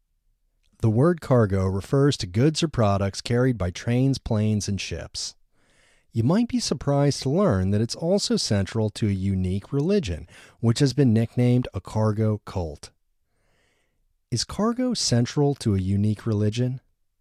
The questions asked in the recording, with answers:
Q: Is cargo central to a unique religion?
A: Yes, cargo is central to a unique religion.